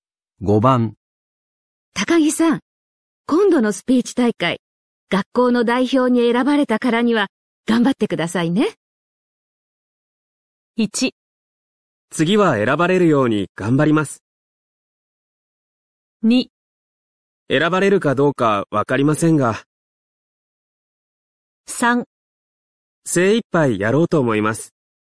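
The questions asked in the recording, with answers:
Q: 高木さん、今度のスピーチ大会、学校の代表に選ばれたからには頑張ってくださいね。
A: 3: 精一杯やろうと思います。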